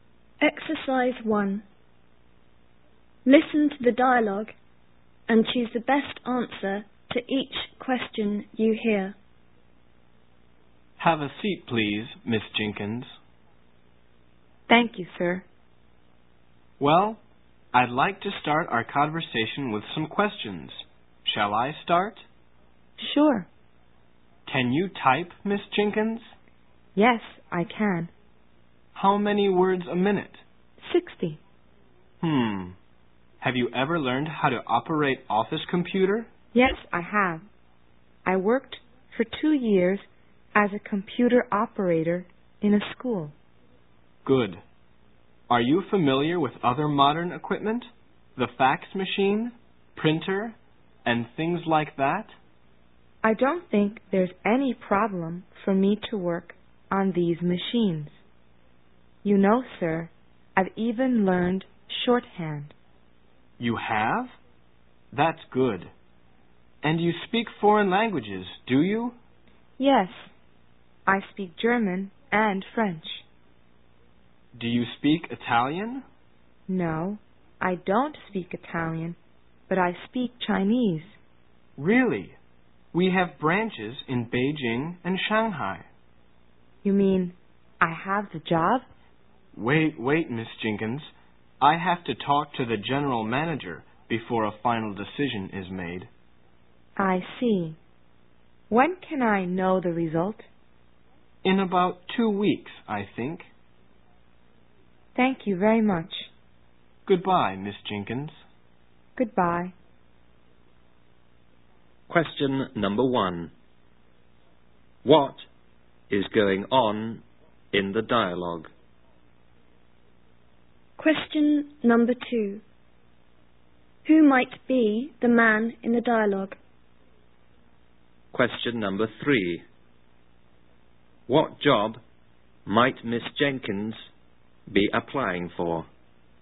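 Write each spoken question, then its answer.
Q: What is going on in the dialogue?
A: A job interview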